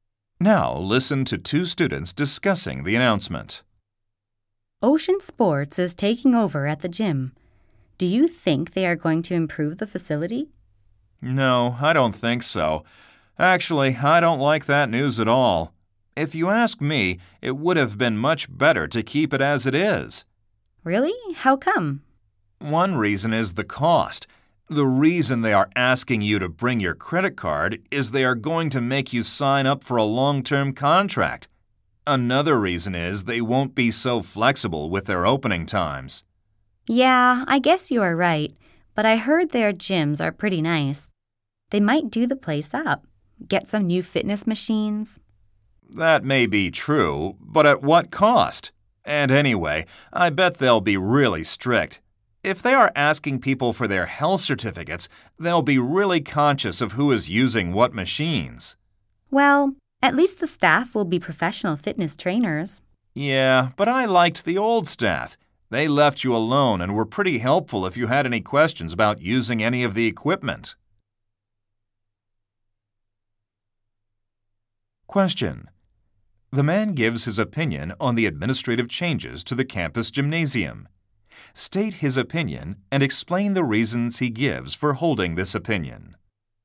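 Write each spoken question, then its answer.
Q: The man gives his opinion on the administrative changes to the campus gymnasium. State his opinion and explain the reasons he gives for holding this opinion.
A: He dislikes the change and would rather keep it as it is: the cost will be higher because of long-term contracts, opening times will be less flexible, the new management will be strict, and he liked the helpful old staff.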